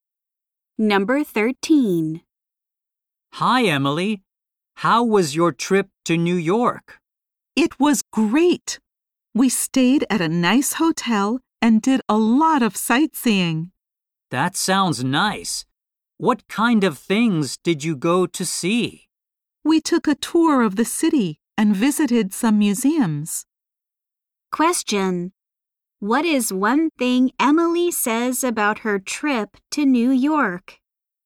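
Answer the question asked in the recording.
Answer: She stayed at a nice hotel, took a city tour and visited museums.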